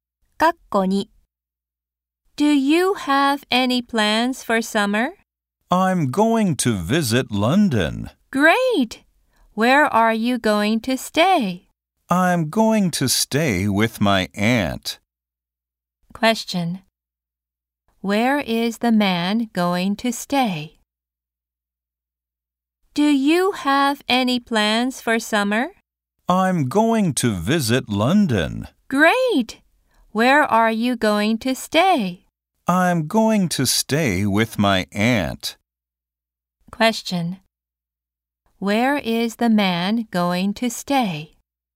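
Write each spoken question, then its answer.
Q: Where is the man going to stay?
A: With his aunt.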